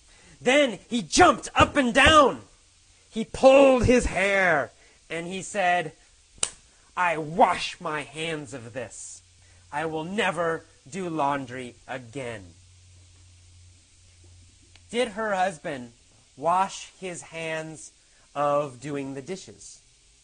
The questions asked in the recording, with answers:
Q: Did her husband wash his hands of doing the dishes?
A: No. He didn't decide never to do the dishes.